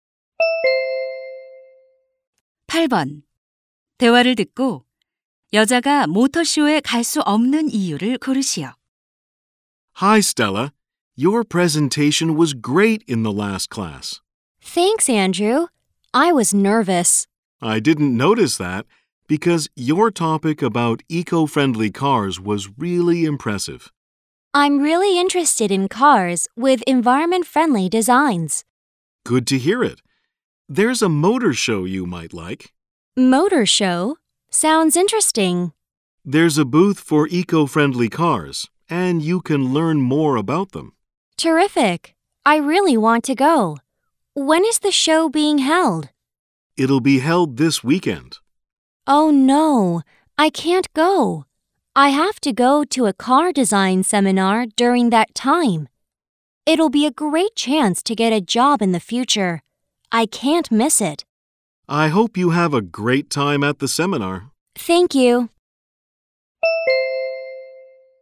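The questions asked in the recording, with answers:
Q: 대화를 듣고 여자가 모터쇼에 갈 수 없는 이유를 고르시오.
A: 자동차 디자인 세미나에 가야 해서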